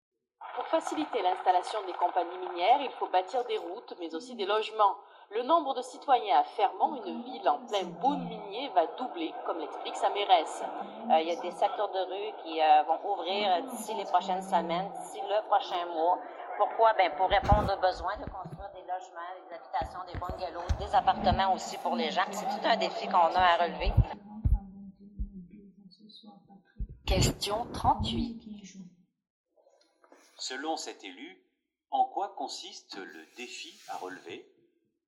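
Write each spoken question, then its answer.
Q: Selon cet élu, en quoi consiste le défi à relever?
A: Construire des logements (bungalows, appartements) pour la population de Fermont qui va doubler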